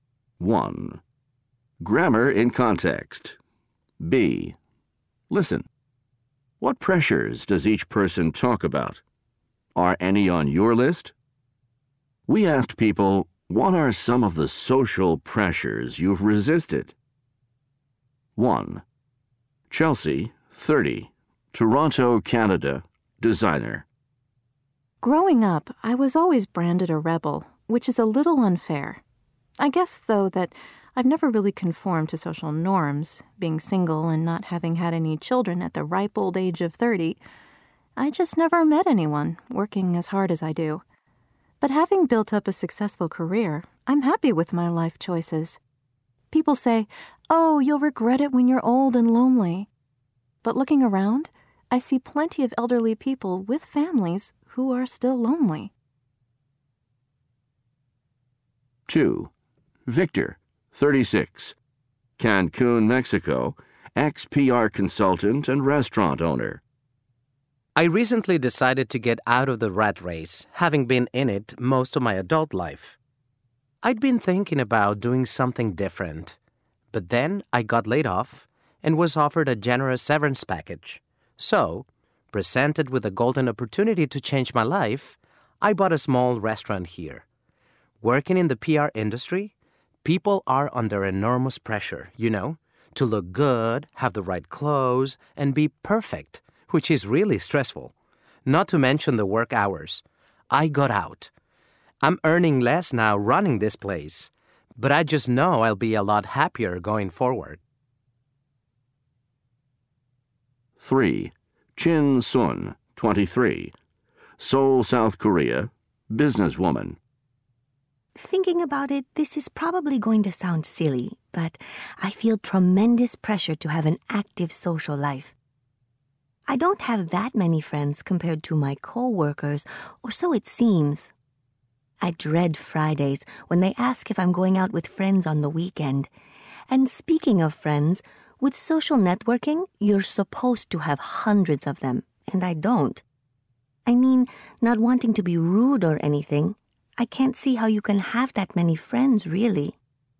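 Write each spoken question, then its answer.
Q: What pressures does each person talk about?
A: Chelsea: pressure to conform, get married and have children; Victor: pressure in PR to look good, wear the right clothes, be perfect, and work long hours; Chin Sun: pressure to have an active social life and many friends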